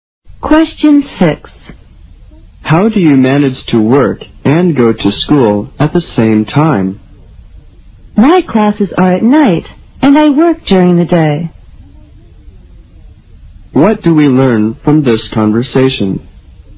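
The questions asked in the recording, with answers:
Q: What do we learn from this conversation?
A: The speaker works during the day and takes classes at night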